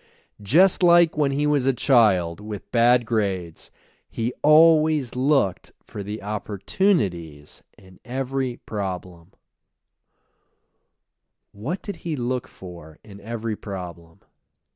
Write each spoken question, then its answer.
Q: What did he look for in every problem?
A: He always looked for the opportunities in every problem.